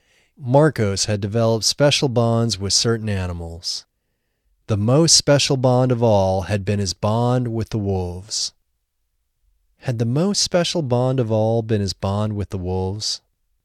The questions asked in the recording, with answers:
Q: Had the most special bond of all been his bond with the wolves?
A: Yes, the most special bond of all had been his bond with the wolves.